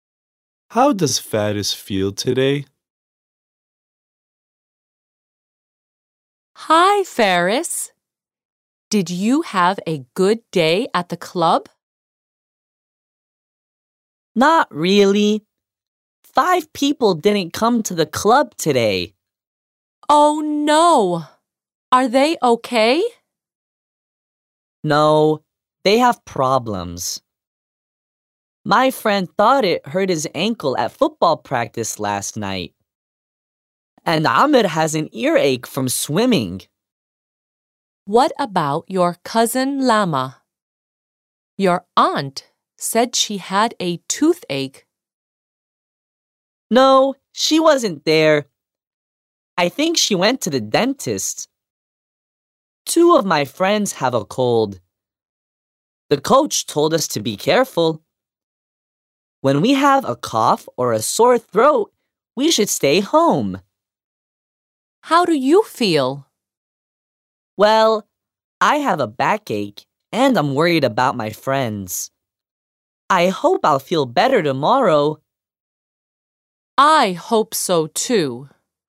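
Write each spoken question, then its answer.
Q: How does Faris feel today?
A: Not well: he has a backache and is worried about his friends.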